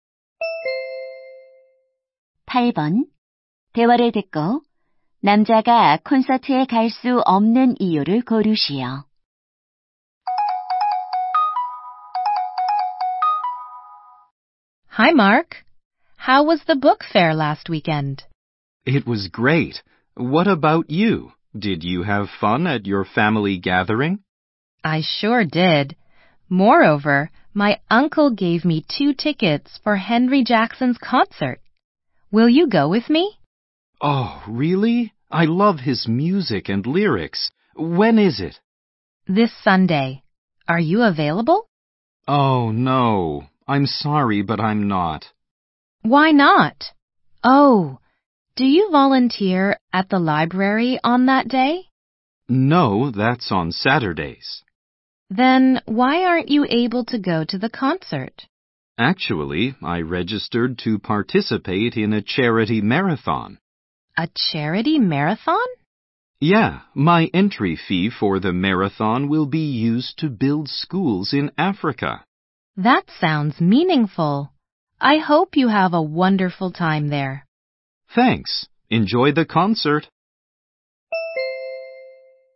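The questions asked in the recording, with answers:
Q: 대화를 듣고 남자가 콘서트에 갈 수 없는 이유를 고르시오.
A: 자선 마라톤에 참가해야 해서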